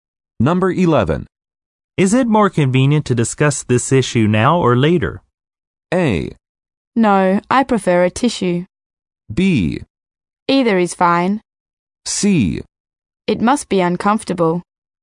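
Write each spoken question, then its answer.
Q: Is it more convenient to discuss this issue now or later?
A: B: Either is fine.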